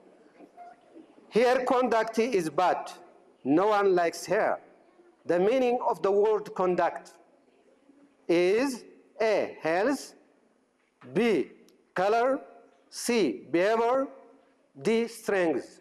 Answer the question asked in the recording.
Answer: C, behavior.